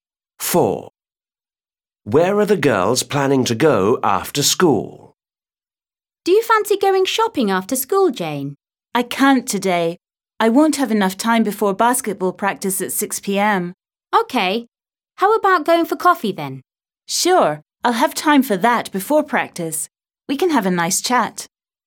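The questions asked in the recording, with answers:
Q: Where are the girls planning to go after school?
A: For coffee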